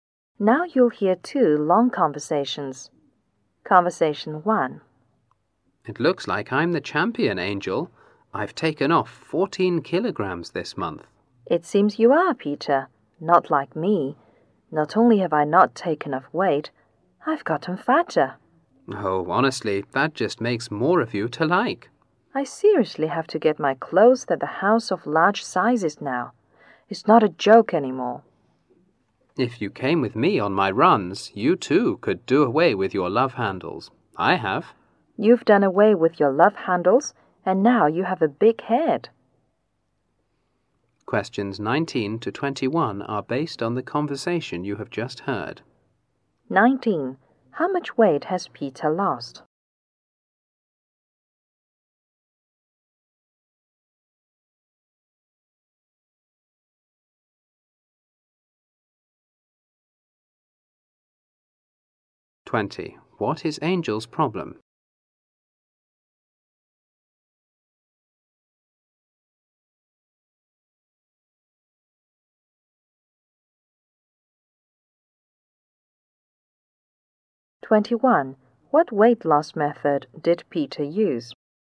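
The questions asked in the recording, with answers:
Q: How much weight has Peter lost?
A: 14 kilograms

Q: What is Angel's problem?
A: She has gained weight

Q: What weight loss method did Peter use?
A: Running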